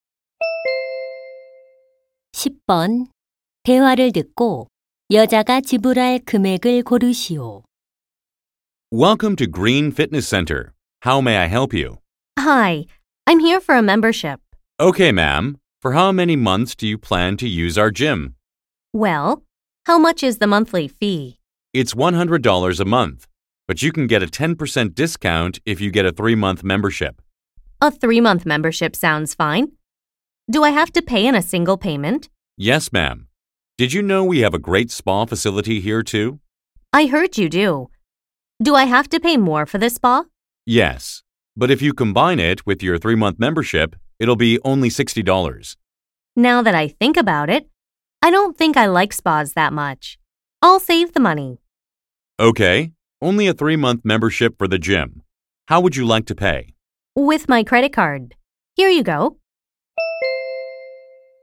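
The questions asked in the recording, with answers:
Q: 대화를 듣고 여자가 지불할 금액을 고르시오.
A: $270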